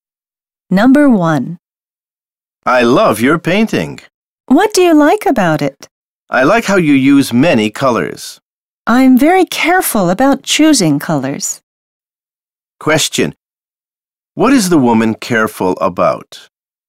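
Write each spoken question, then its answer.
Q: What is the woman careful about?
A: Choosing colors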